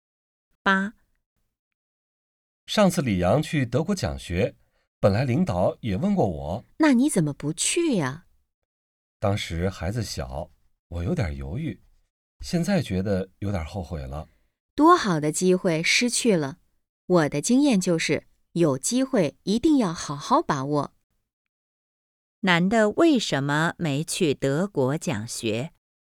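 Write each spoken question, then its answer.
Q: 男的为什么没去德国讲学?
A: 当时孩子小,他有点犹豫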